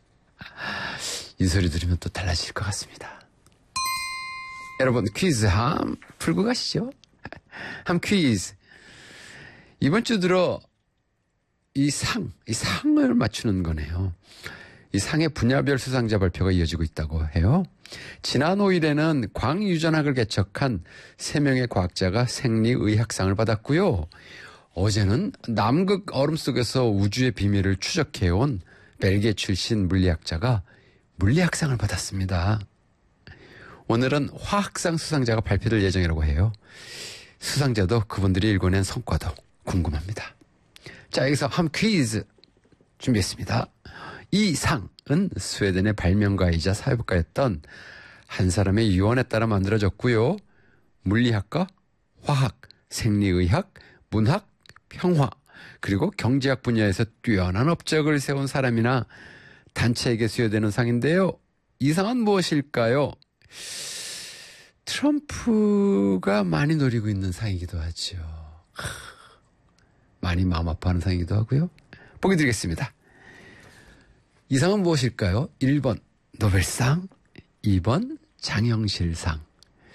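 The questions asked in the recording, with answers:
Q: 이 상은 무엇일까요?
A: 1번: 노벨상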